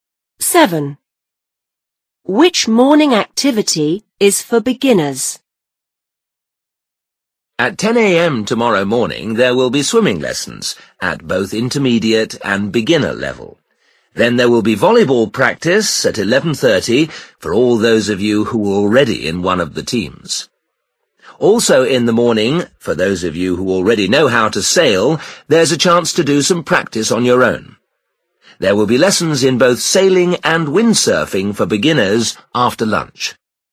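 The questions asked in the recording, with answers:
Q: Which morning activity is for beginners?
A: Swimming lessons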